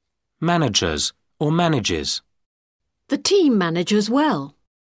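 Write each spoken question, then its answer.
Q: Managers or manages.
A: manages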